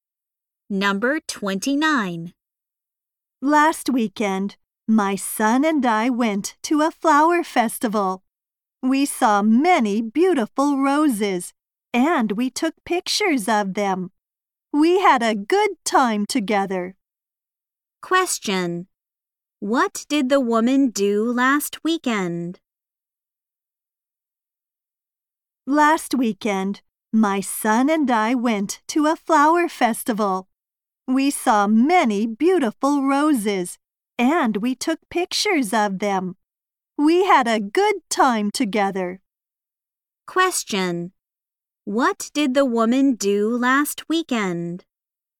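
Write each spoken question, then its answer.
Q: What did the woman do last weekend?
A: She went to a flower festival with her son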